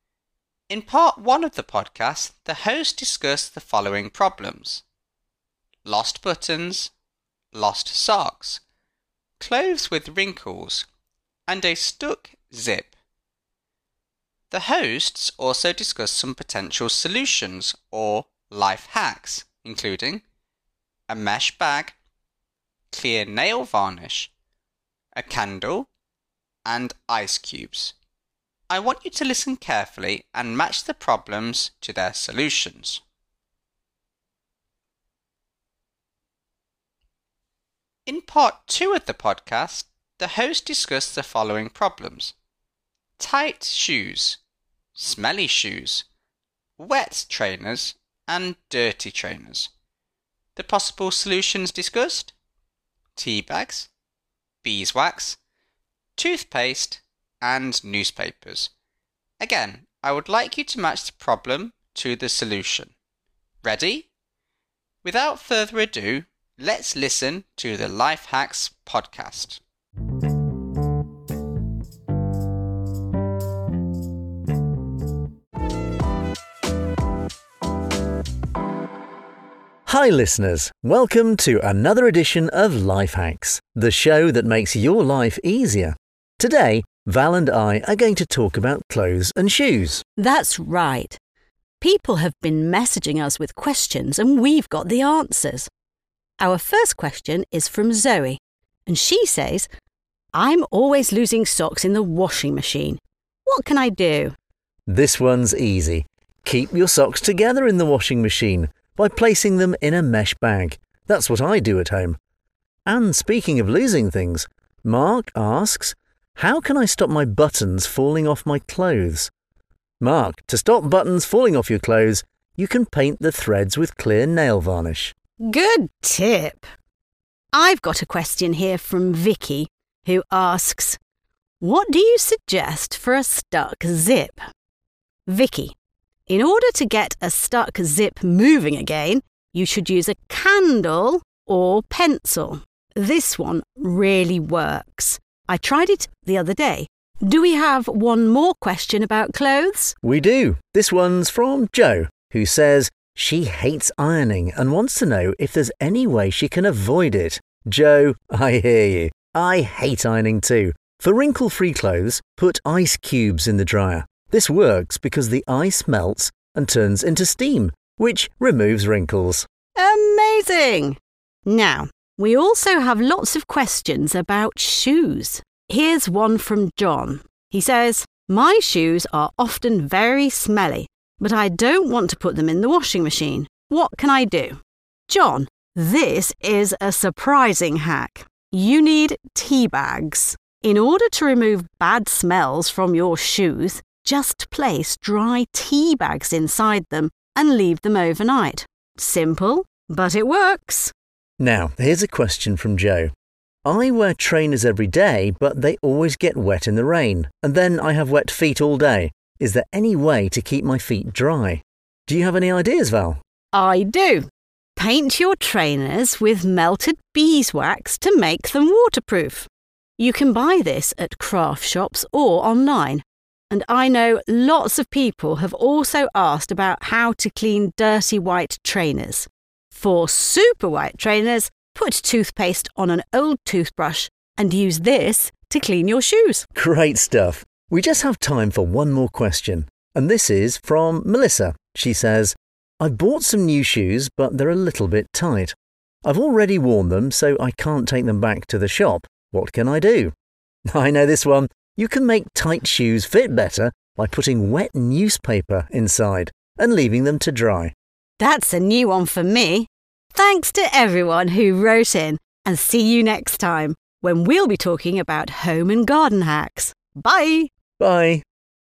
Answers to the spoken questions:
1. to prevent losing buttons, the host recommended painting the threads with clear nail varnish
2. for lost socks, the host recommended using a mesh bag to keep the socks together
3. for clothes with wrinkles, it was recommended to put ice cubes in the dryer
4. to get a stuck zip moving again, the host recommended a pencil or candle
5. for tight shoes, they recommended placing wet newspaper inside the shoes and allowing them to dry
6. The solution for smelly shoes was to place tea bags in them overnight.
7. to stop shoes getting wet, the host recommended using melted beeswax
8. for dirty trainers, the host advised listeners to put toothpaste on an old toothbrush